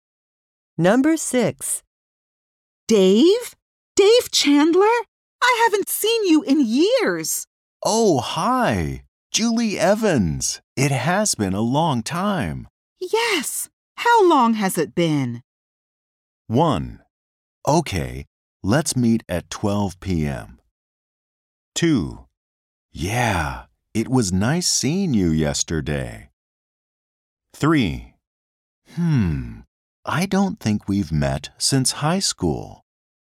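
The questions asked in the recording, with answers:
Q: Yes. How long has it been?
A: 3: I don't think we've met since high school.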